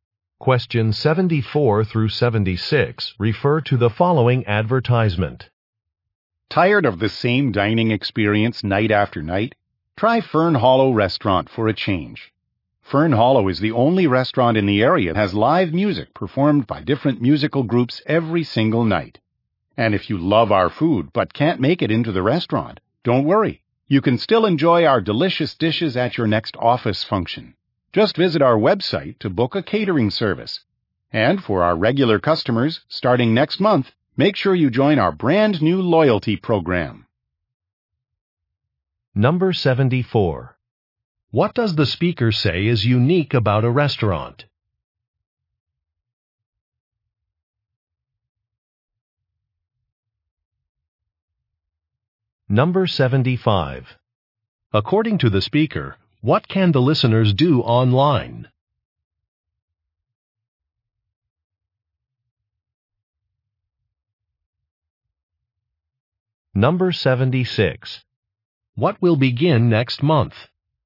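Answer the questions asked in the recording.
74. Live music every night
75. Book a catering service
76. A loyalty program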